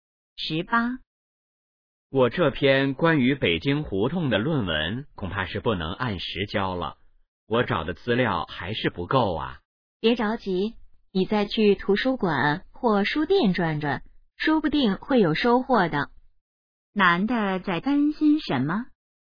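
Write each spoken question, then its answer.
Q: 男的在担心什么?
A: 论文不能按时交(资料不够)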